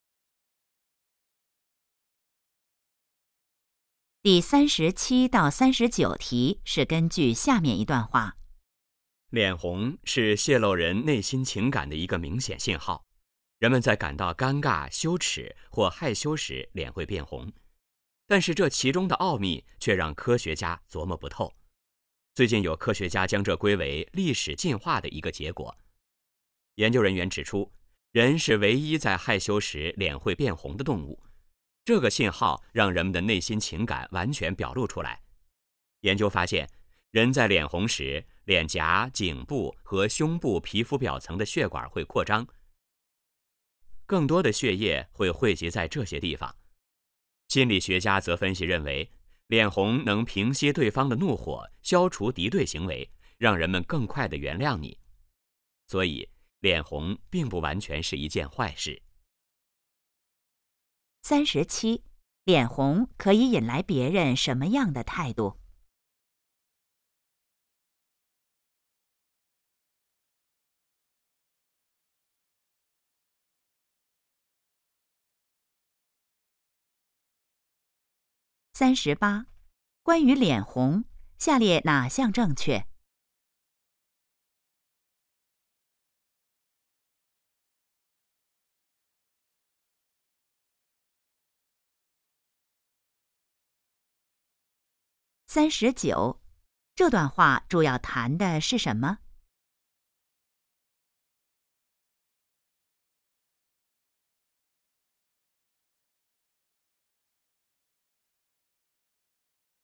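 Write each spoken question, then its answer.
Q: 脸红可以引来别人什么样的态度?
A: 更快地原谅你

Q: 这段话主要谈的是什么?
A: 脸红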